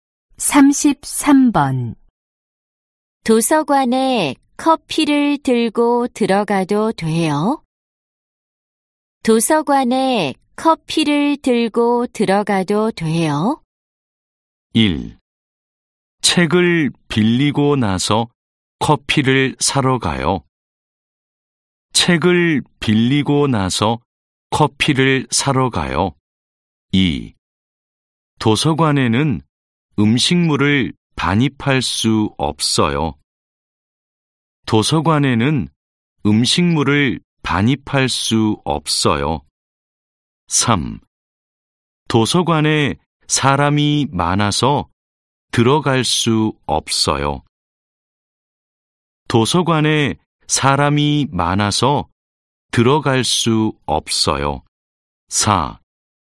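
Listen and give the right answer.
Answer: 2: 도서관에는 음식물을 반입할 수 없어요.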